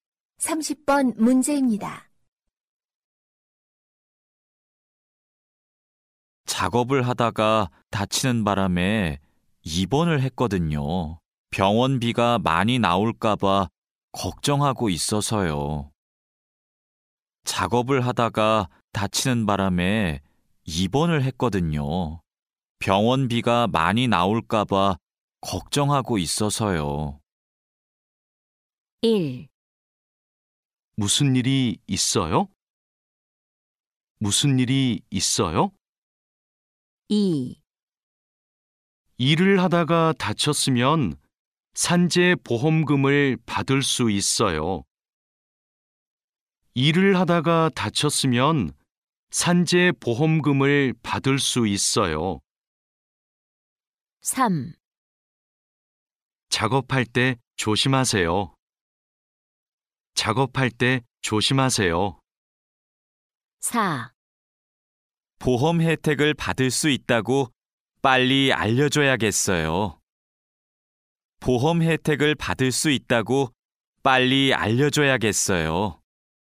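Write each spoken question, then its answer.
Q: 작업을 하다가 다치는 바람에 입원을 했거든요. 병원비가 많이 나올까 봐 걱정하고 있어서요.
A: 2: 일을 하다가 다쳤으면 산재보험금을 받을 수 있어요.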